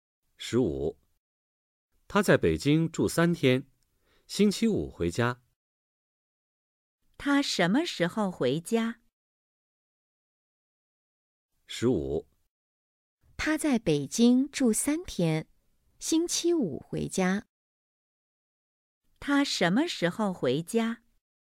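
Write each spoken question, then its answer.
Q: 他什么时候回家?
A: 星期五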